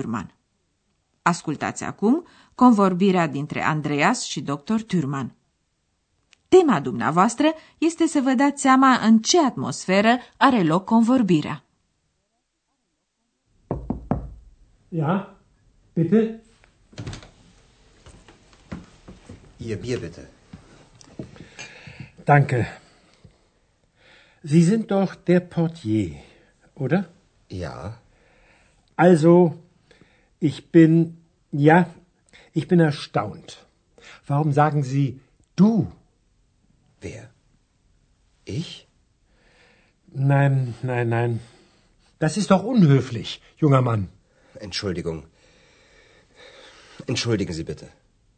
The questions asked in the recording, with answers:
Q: Tema dumneavoastră este să vă dați seama în ce atmosferă are loc convorbirea.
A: Ei da, a fost o atmosferă destul de rece.